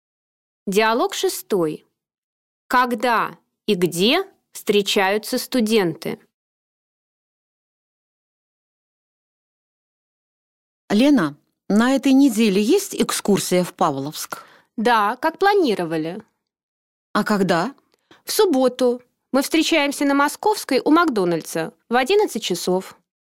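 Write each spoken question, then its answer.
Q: Когда и где встречаются студенты?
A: В субботу в 11 часов на Московской у Макдональдса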